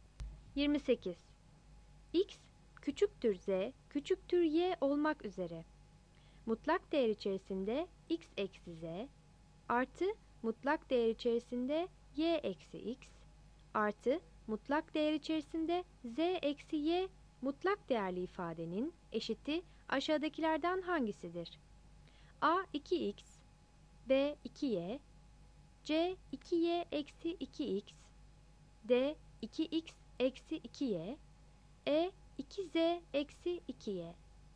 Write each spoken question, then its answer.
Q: Mutlak değer içerisinde X eksi Z artı mutlak değer içerisinde Y eksi X artı mutlak değer içerisinde Z eksi Y mutlak değerli ifadenin eşiti aşağıdakilerden hangisidir?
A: 28 C